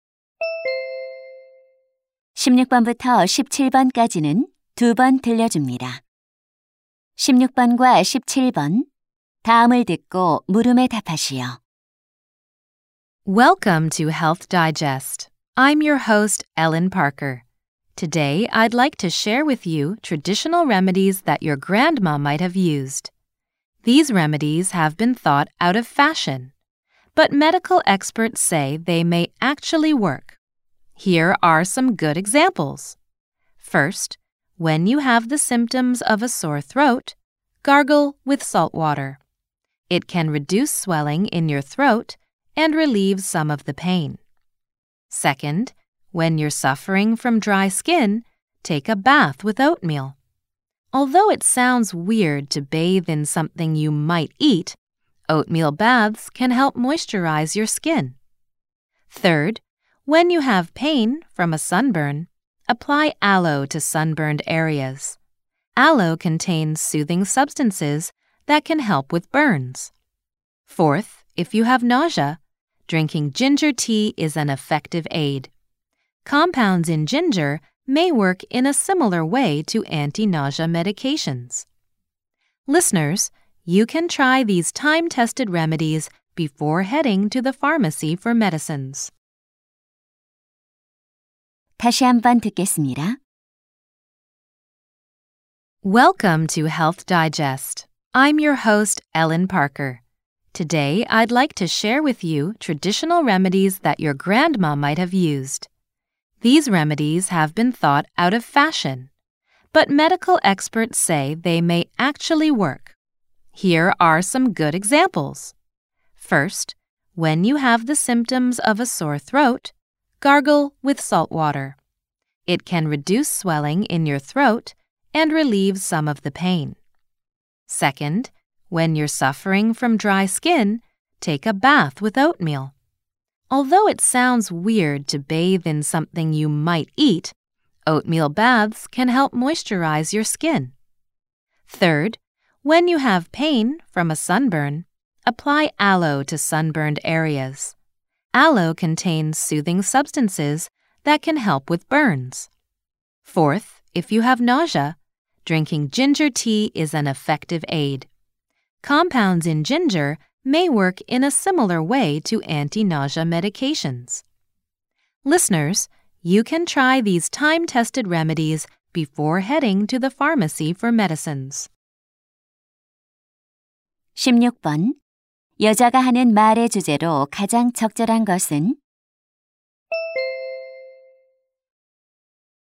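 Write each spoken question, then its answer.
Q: 여자가 하는 말의 주제로 가장 적절한 것은?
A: 효과가 있는 전통 민간요법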